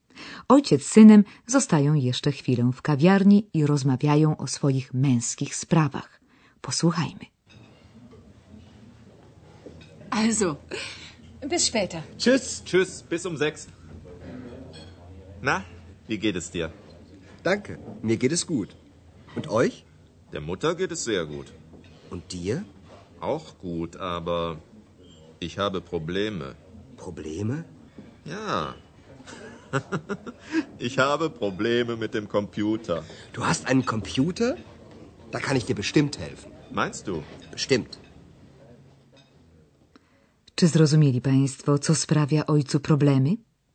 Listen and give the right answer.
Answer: Otóż komputer, który ma od niedawna.